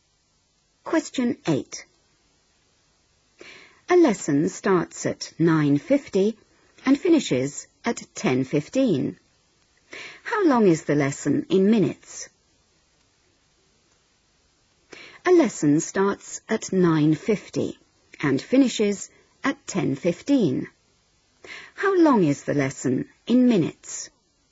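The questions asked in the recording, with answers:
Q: How long is the lesson in minutes?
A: 25 minutes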